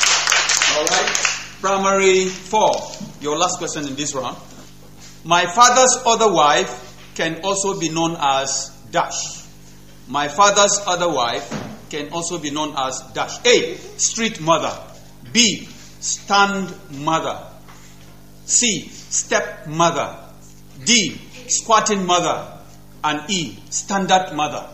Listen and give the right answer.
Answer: C, step mother.